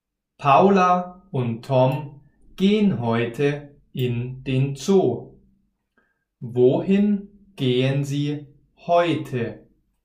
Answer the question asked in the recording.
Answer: In den Zoo. Sie gehen heute in den Zoo.